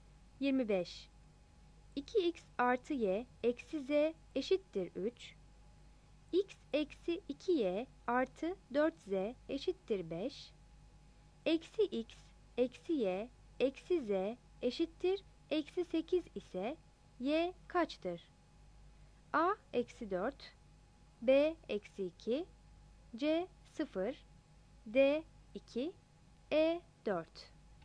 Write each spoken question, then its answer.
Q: 2x artı y eksi z eşittir 3, x eksi 2y artı 4z eşittir 5, eksi x, eksi y, eksi z eşittir eksi 8 ise y kaçtır?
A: 25 E